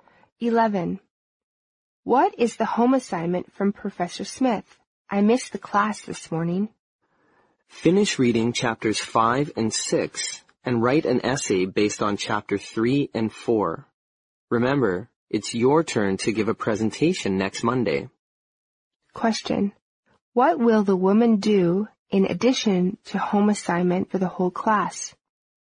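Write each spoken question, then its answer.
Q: What will the woman do in addition to home assignment for the whole class?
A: Give a presentation next Monday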